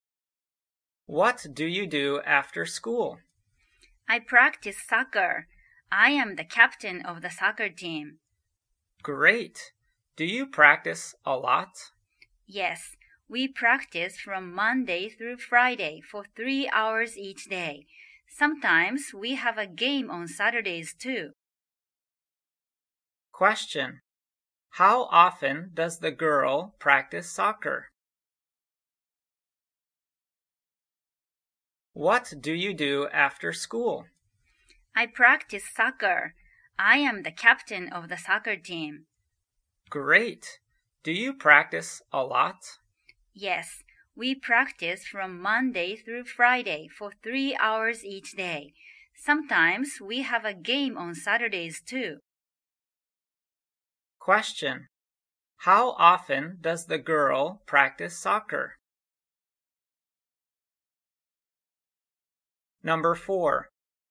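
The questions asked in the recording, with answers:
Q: How often does the girl practice soccer?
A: Monday through Friday, 3 hours each day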